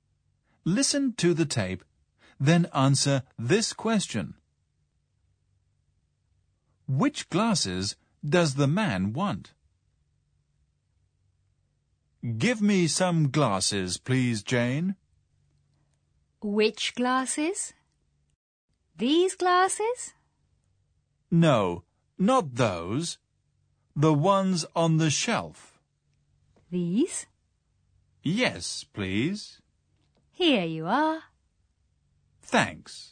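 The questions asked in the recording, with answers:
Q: Which glasses does the man want?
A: The ones on the shelf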